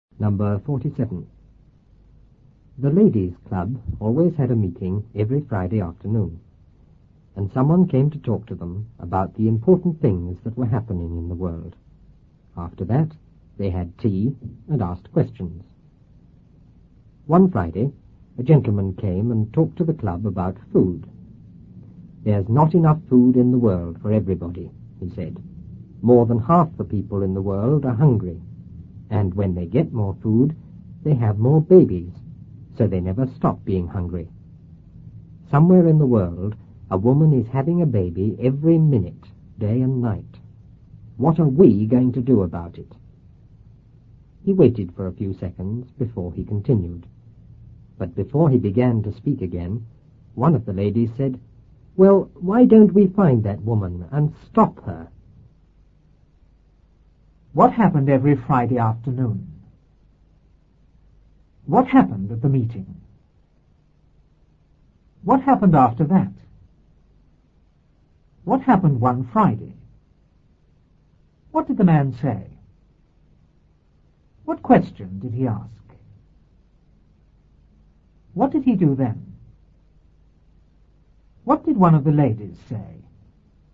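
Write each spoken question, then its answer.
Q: What happened every Friday afternoon?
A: The ladies' club had a meeting.

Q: What happened at the meeting?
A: Someone came to talk to them about important things happening in the world.

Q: What happened after that?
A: They had tea and asked questions.

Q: What happened one Friday?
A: A gentleman came and talked to the club about food.

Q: What did the man say?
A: There's not enough food in the world; more than half the people are hungry, and somewhere a woman has a baby every minute.

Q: What question did he ask?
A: What are we going to do about it?

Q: What did he do then?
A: He waited for a few seconds.

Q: What did one of the ladies say?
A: Why don't we find that woman and stop her?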